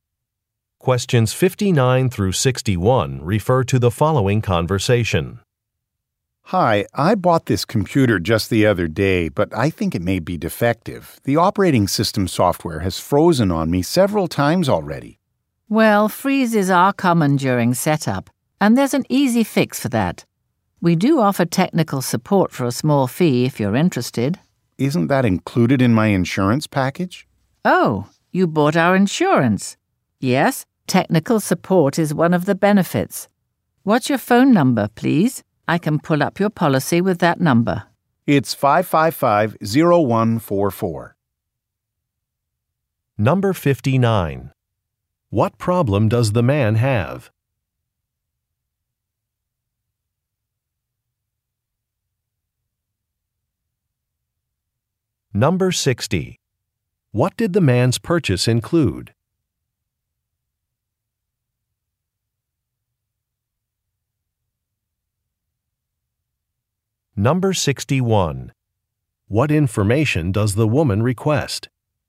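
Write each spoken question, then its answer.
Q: What problem does the man have?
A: His computer software keeps freezing

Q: What did the man's purchase include?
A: An insurance package with technical support

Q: What information does the woman request?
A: His phone number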